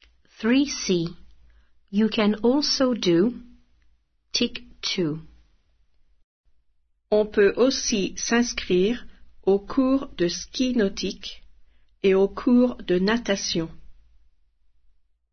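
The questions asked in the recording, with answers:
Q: You can also do tick two.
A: water skiing and swimming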